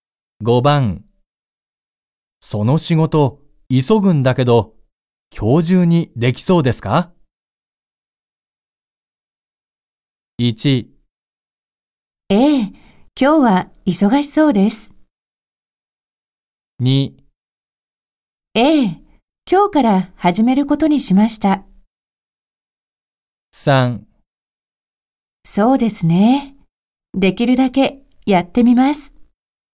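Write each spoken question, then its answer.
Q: その仕事急ぐんだけど今日中にでき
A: 3: そうですね。できるだけやってみます。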